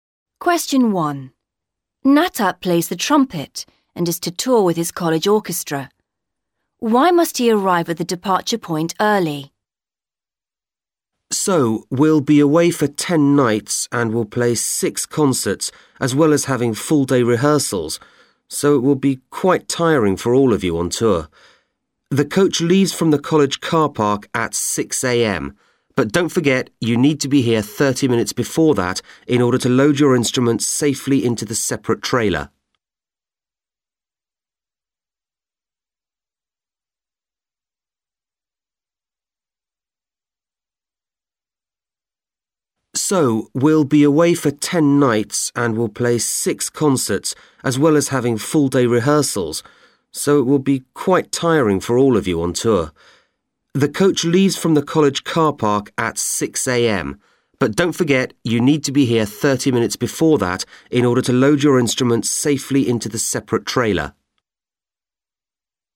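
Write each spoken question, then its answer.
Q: Why must he arrive at the departure point early?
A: To load the instruments safely into the separate trailer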